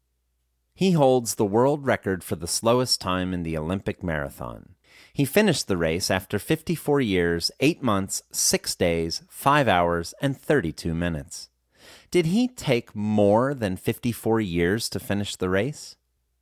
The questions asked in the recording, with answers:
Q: Did he take more than 54 years to finish the race?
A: Yes, he took more than 54 years to finish the race.